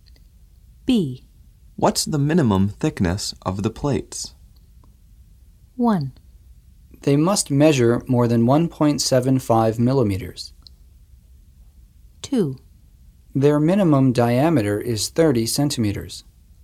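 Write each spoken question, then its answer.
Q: What's the minimum thickness of the plates?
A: 1: They must measure more than 1.75 millimeters.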